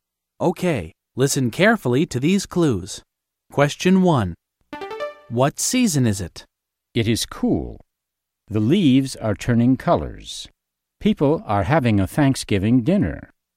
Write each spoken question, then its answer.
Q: What season is it?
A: Thanksgiving? Americans have Thanksgiving in the fall.